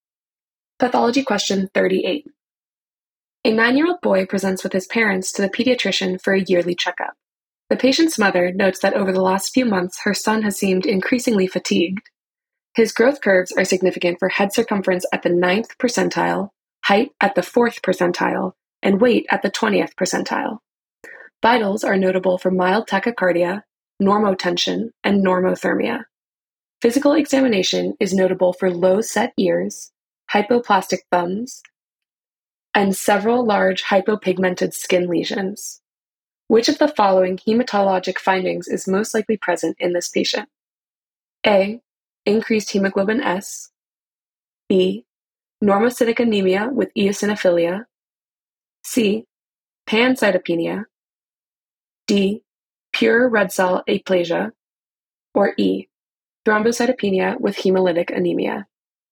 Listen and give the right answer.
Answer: The correct answer is C. Pancytopenia.